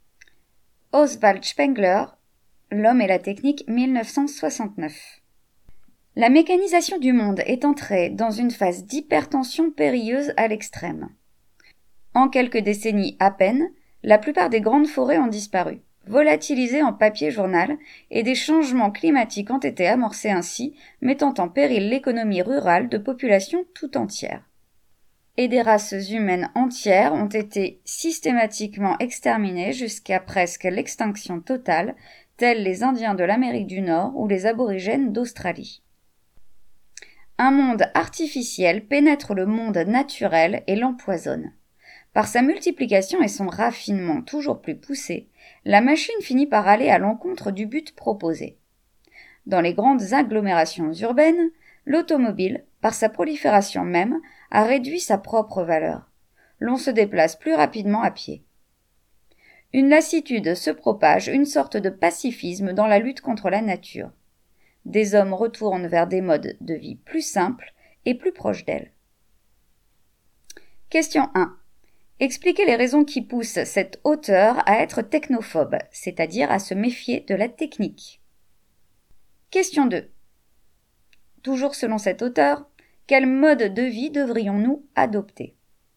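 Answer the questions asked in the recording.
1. La mécanisation détruit la nature (forêts disparues, changements climatiques), a contribué à l'extermination de peuples entiers, empoisonne le monde naturel et finit par aller contre son propre but (l'automobile ralentit les déplacements en ville).
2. Un mode de vie plus simple et plus proche de la nature.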